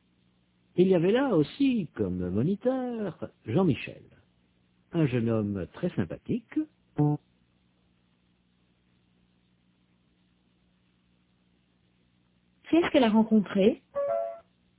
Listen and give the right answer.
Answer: Un jeune homme très sympathique.